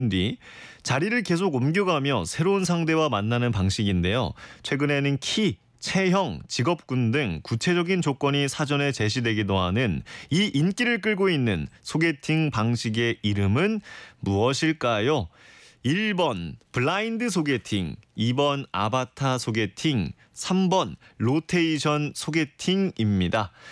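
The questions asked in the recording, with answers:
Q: 최근에는 키, 체형, 직업군 등 구체적인 조건이 사전에 제시되기도 하는 이 인기를 끌고 있는 소개팅 방식의 이름은 무엇일까요?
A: 3번: 로테이션 소개팅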